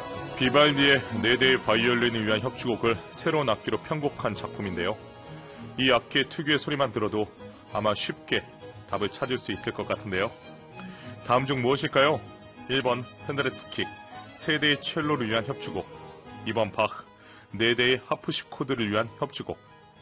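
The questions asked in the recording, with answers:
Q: 다음 중 무엇일까요?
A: 2번: 바흐, 네 대의 하프시코드를 위한 협주곡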